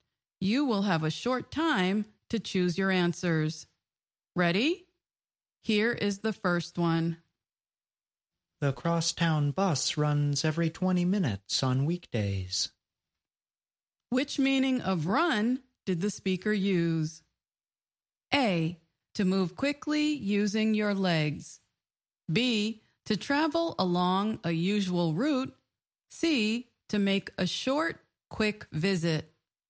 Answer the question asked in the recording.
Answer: The answer is B, to travel along a usual route.